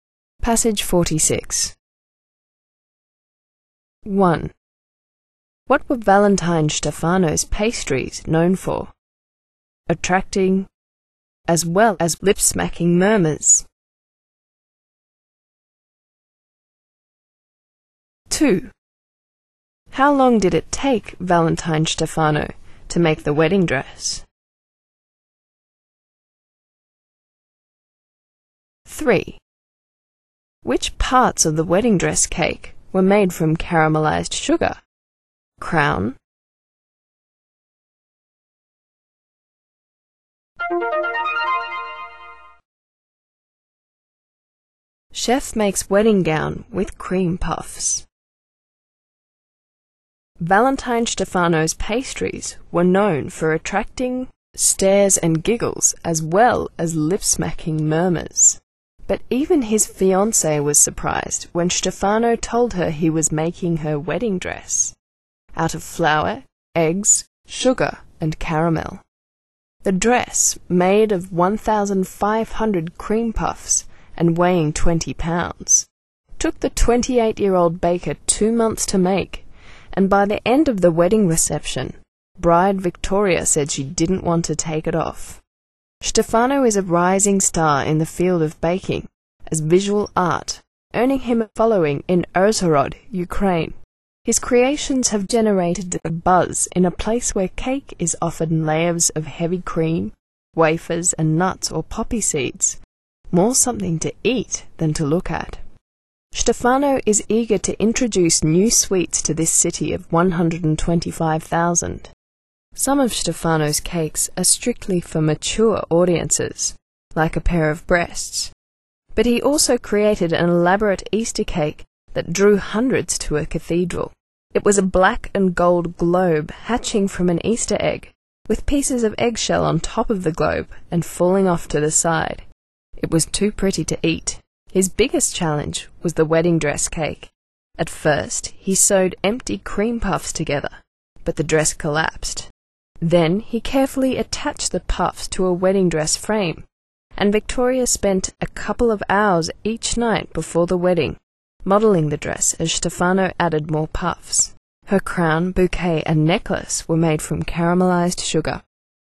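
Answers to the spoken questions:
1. Attracting stares and giggles as well as lip-smacking murmurs
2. 2 months
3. Her crown, bouquet, and necklace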